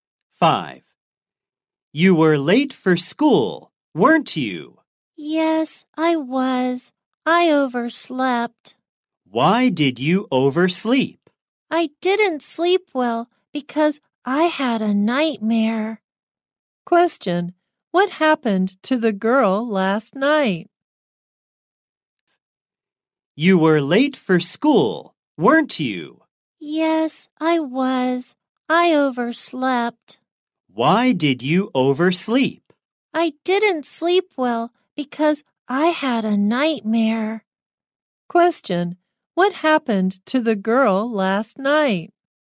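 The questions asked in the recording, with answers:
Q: Question, what happened to the girl last night?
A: She had a nightmare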